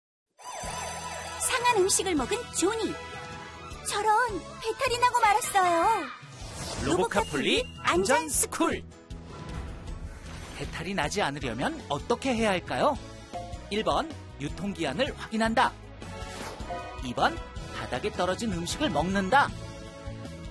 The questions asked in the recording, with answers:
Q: 배탈이 나지 않으려면 어떻게 해야 할까요?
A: 정답은 1번. 음식을 먹기 전에는 유통기한을 꼭 확인해야 해요.